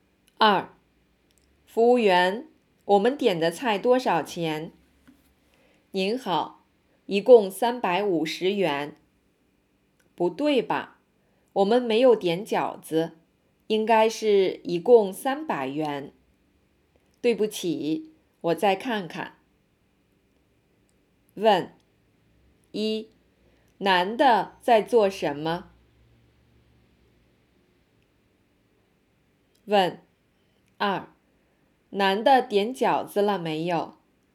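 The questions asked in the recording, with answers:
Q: 男的在做什么?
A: 在饭馆结账(问点的菜多少钱)

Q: 男的点饺子了没有?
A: 没有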